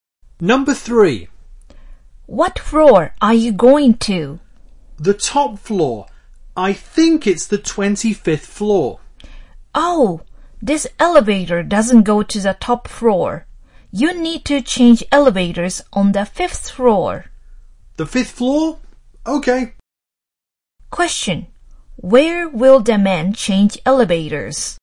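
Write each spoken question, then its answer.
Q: Where will the man change elevators?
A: On the 5th floor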